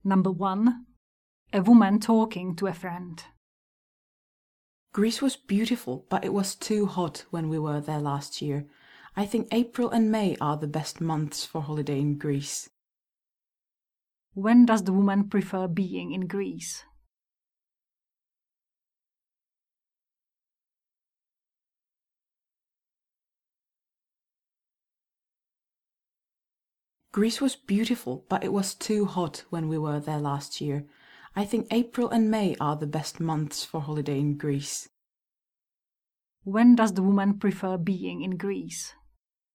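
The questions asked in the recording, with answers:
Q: When does the woman prefer being in Greece?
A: In April and May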